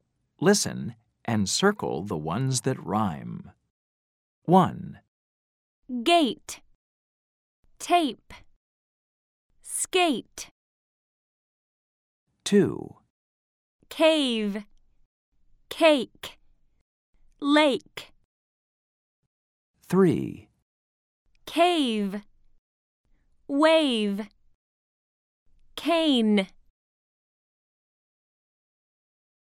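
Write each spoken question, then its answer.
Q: Gate. Tape. Skate.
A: Gate, Skate

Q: Cave. Cake. Lake.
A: Cake, Lake

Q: Cave. Wave. Cane.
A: Cave, Wave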